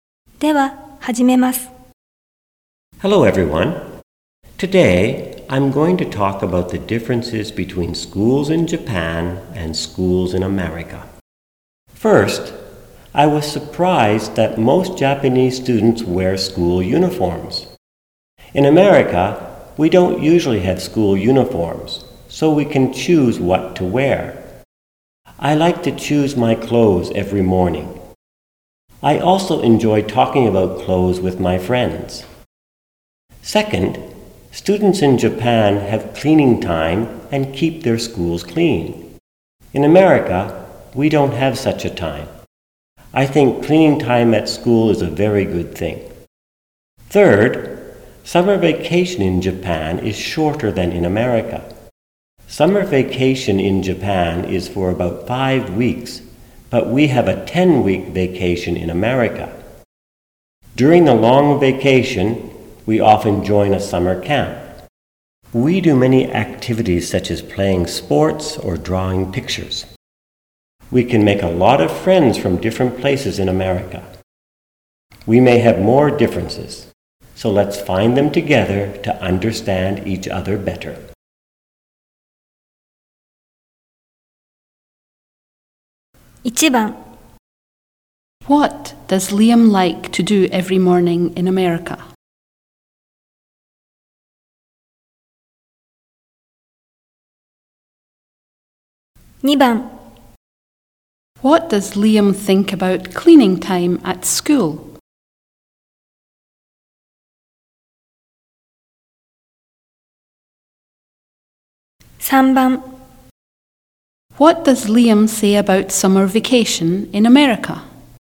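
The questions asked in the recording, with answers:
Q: What does Liam like to do every morning in America?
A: He likes to choose his clothes.

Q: What does Liam think about cleaning time at school?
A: He thinks it is a very good thing.

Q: What does Liam say about summer vacation in America?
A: It is about 10 weeks long, longer than in Japan, and students often join a summer camp.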